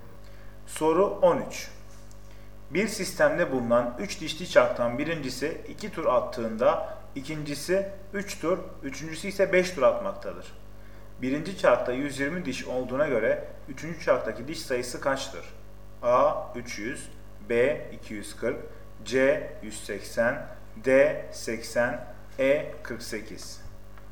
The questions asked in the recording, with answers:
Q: çarktaki diş sayısı kaçtır?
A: Doğru cevap E 48.